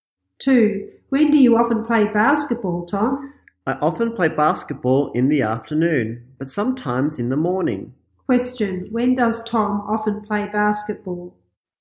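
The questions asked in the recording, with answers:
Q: When does Tom often play basketball?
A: In the afternoon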